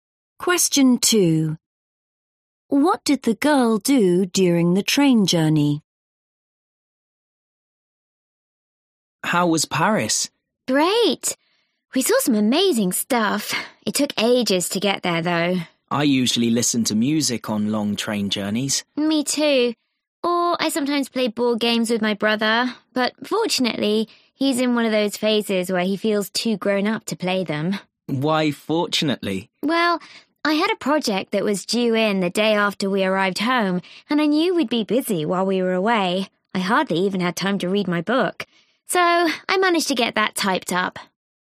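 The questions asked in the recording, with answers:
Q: What did the girl do during the train journey?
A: She typed up her project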